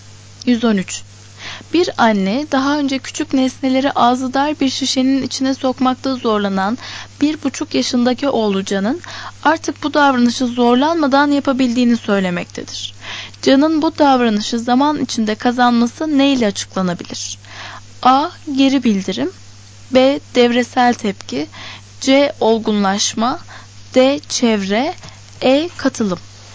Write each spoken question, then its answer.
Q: Can'ın bu davranışı zaman içinde kazanması neyle açıklanabilir?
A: Doğru cevap C.